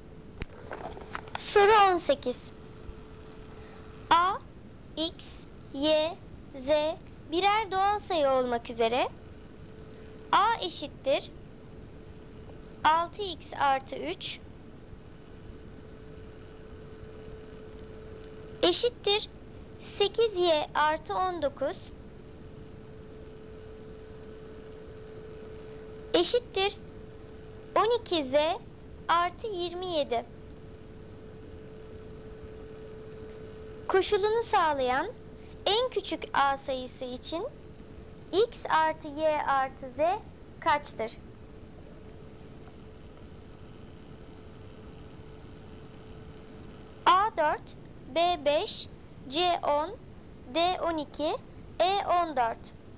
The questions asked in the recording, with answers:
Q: Koşulunu sağlayan en küçük A sayısı için X artı Y artı Z kaçtır?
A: Doğru cevap B5.